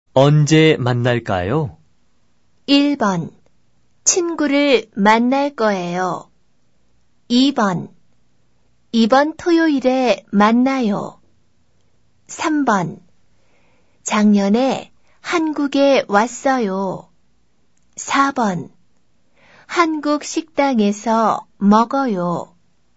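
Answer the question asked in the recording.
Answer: 2: 이번 토요일에 만나요.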